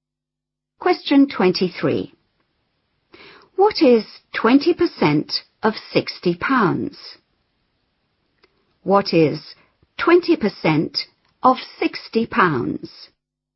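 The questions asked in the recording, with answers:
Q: What is 20% of 60 pounds?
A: £12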